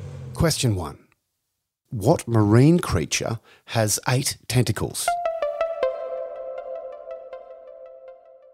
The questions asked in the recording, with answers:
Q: What marine creature has 8 tentacles?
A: The octopus.